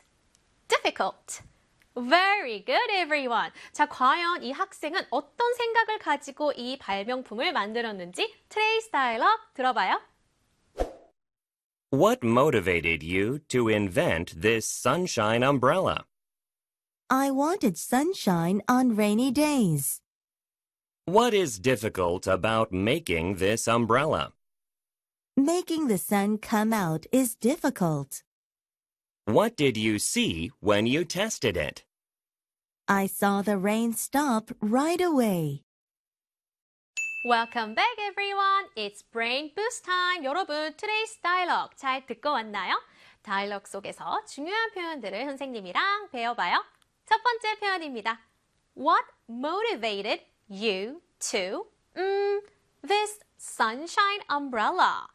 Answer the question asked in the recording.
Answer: 바로 invent였어요.